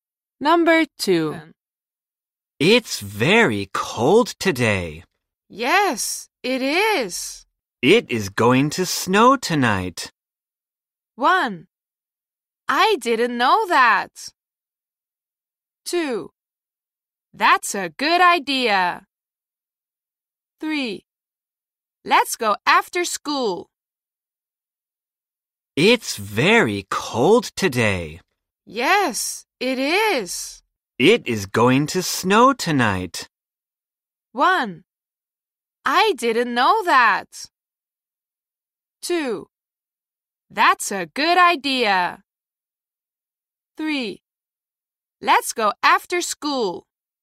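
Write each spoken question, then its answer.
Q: It is going to snow tonight.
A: 1: I didn't know that.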